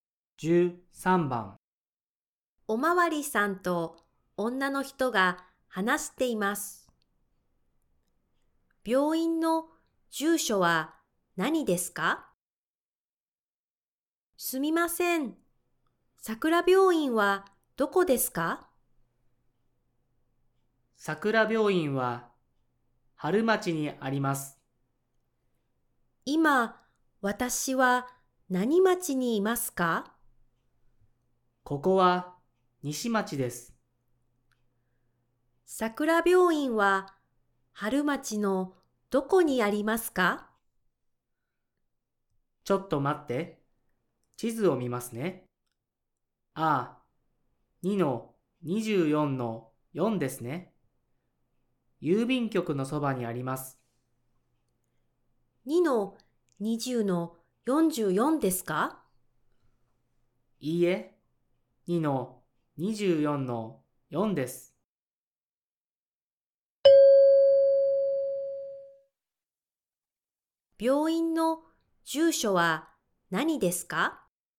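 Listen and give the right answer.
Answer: 春町2-24-4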